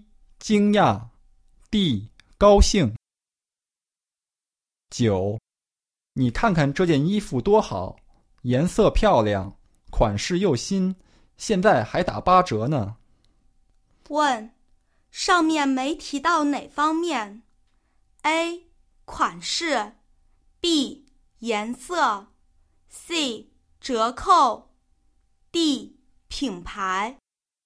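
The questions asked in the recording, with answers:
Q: 问,上面没提到哪方面?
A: D: 品牌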